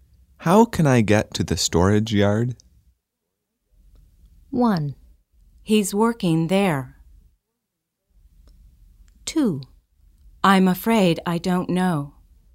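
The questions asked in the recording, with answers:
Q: How can I get to the storage yard?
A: 2: I'm afraid I don't know.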